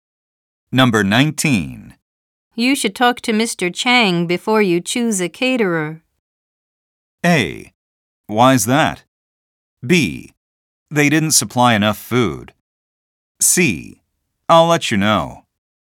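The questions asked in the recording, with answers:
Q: You should talk to Mr. Chang before you choose a caterer.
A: A: Why's that?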